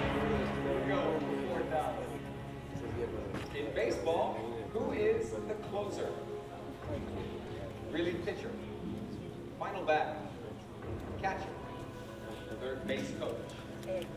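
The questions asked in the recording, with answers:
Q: In baseball, who is the closer?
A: A: Relief pitcher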